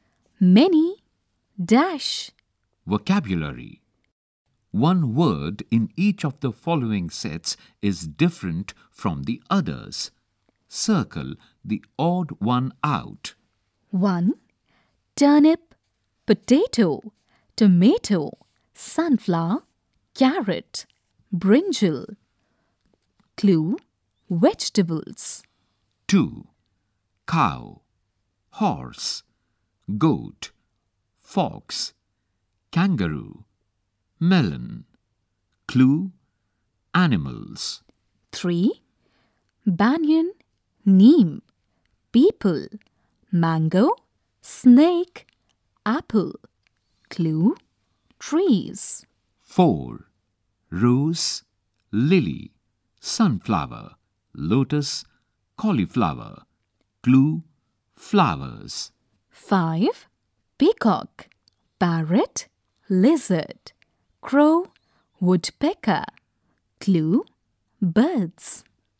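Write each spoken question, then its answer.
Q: Turnip, potato, tomato, sunflower, carrot, brinjal.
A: sunflower

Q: Cow, horse, goat, fox, kangaroo, melon.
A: melon

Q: Rose, lily, sunflower, lotus, cauliflower.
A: cauliflower

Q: Peacock, parrot, lizard, crow, woodpecker.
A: lizard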